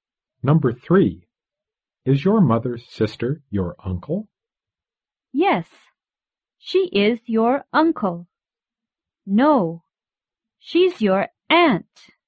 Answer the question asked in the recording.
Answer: No, your mother's sister is your aunt.